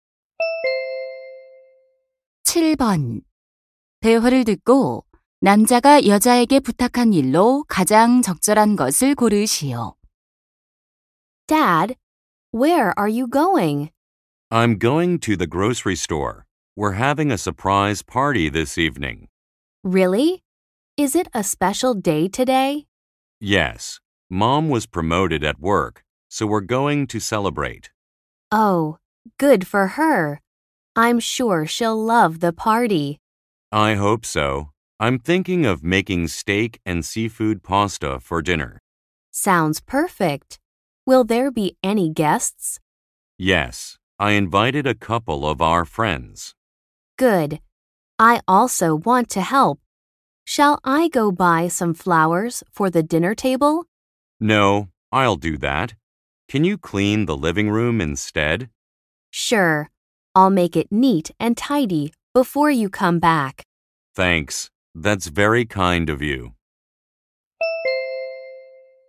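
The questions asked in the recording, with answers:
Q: 대화를 듣고 남자가 여자에게 부탁한 일로 가장 적절한 것을 고르시오.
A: 거실 청소하기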